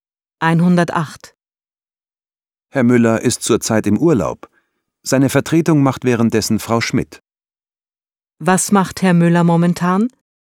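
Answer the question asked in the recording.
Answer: Er ist im Urlaub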